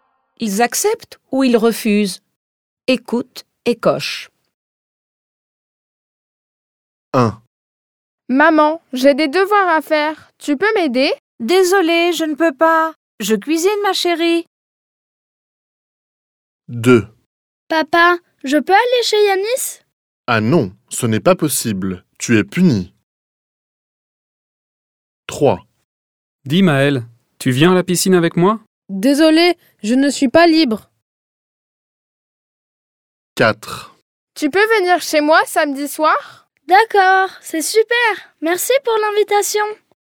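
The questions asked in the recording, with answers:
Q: Ils acceptent ou ils refusent?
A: Ils refusent

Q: Ils acceptent ou ils refusent?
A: Ils refusent

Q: Ils acceptent ou ils refusent?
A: Ils refusent

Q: Ils acceptent ou ils refusent?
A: Ils acceptent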